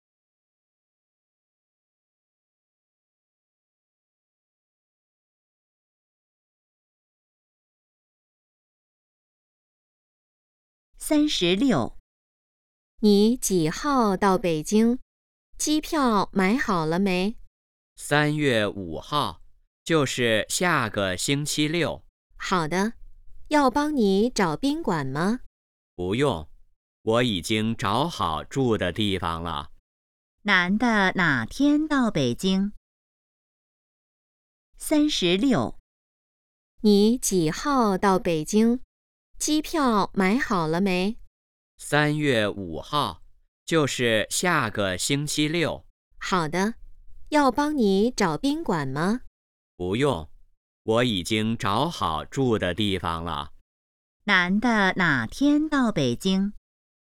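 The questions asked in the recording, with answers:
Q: 男的哪天到北京?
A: 3月5号(下个星期六)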